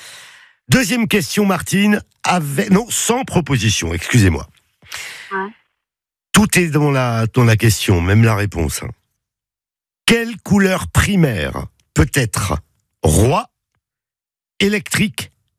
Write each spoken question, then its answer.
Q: Quelle couleur primaire peut être roi, électrique,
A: Eh ben ouais, le bleu.